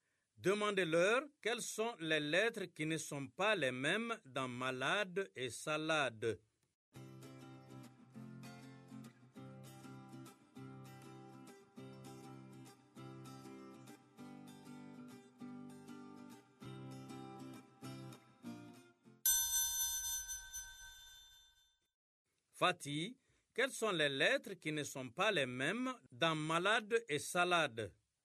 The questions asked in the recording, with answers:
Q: Fatih, quelles sont les lettres qui ne sont pas les mêmes dans malade et salade?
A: M dans malade et S dans salade.